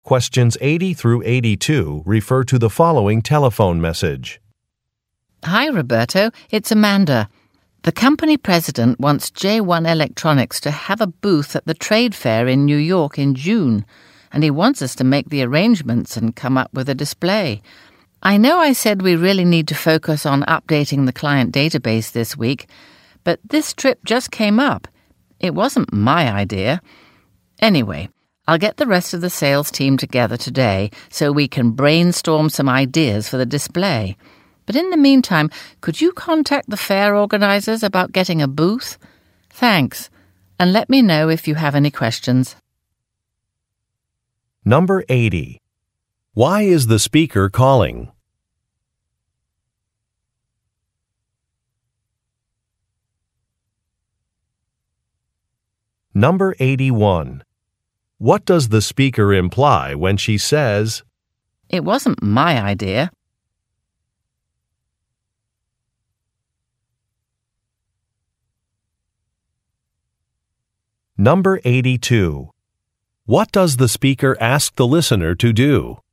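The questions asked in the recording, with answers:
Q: Why is the speaker calling?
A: To ask for help arranging a booth and display for a trade fair in New York

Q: What does the speaker imply when she says, "It wasn't my idea"?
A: The change in plans (the trip replacing the database work) was not her decision; it came from the company president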